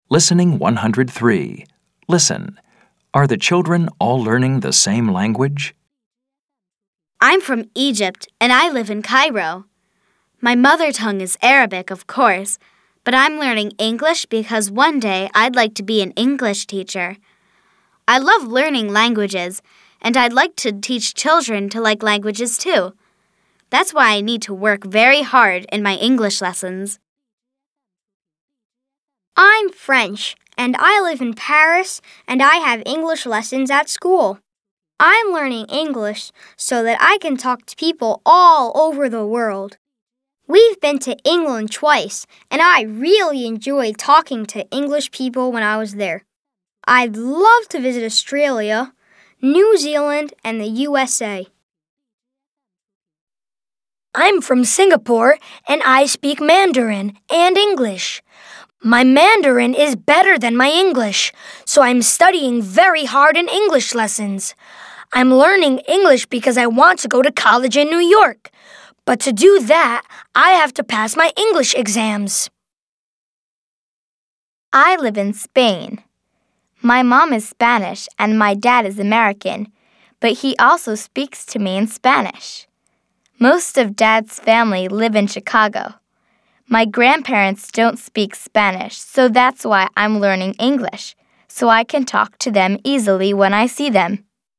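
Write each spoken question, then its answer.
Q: Are the children all learning the same language?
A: Yes, they are all learning English.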